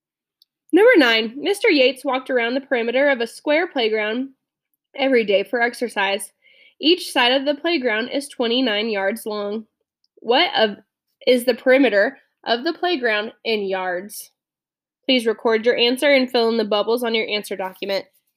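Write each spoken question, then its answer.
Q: What is the perimeter of the playground in yards?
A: 116 yards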